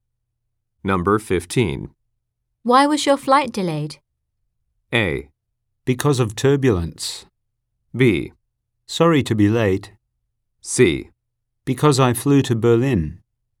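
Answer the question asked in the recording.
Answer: A: Because of turbulence.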